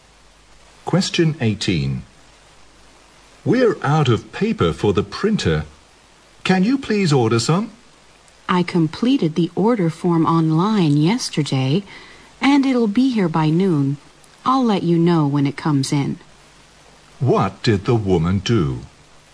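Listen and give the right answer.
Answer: She ordered printer paper online yesterday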